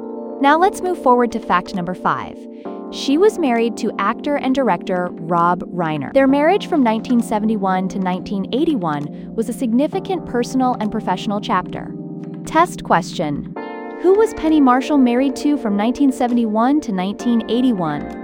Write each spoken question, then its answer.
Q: Who was Penny Marshall married to from 1971 to 1981?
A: Correct answer, Rob Reiner.